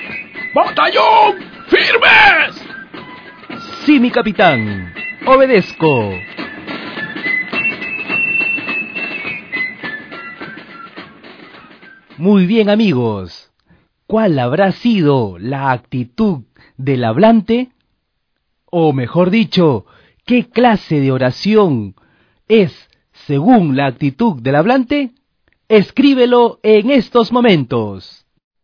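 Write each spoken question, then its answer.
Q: O mejor dicho, ¿qué clase de oración es según la actitud del hablante?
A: Oración imperativa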